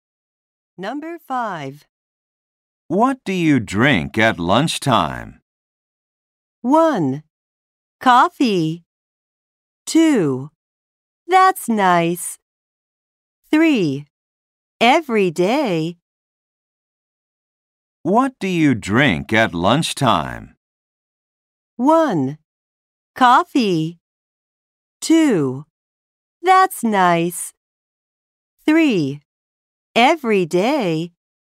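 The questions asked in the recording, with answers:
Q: What do you drink at lunchtime?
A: 1: Coffee.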